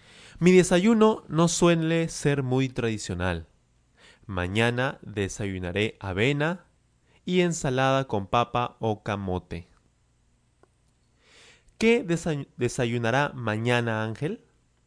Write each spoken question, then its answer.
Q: ¿Qué desayunará mañana Ángel?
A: Claro, él desayunará avena y ensalada con papa o camote.